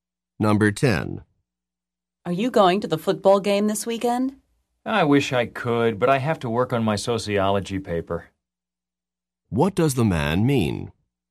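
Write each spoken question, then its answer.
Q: What does the man mean?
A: He can't go to the game because he has to work on his paper.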